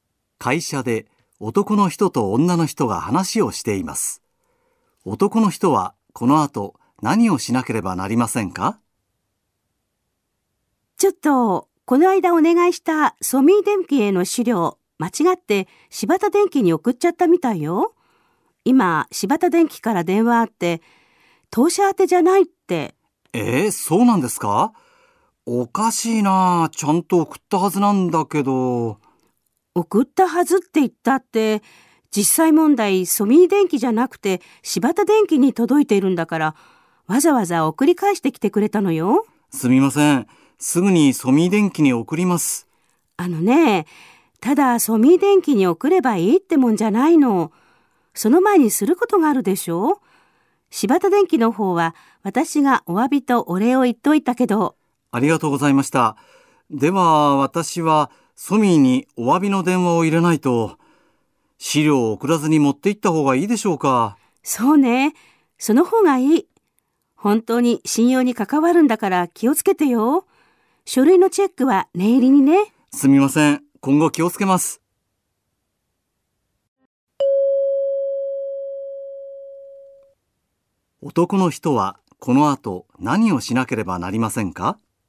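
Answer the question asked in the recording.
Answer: ソミー電機にお詫びの電話をして、資料を持って行く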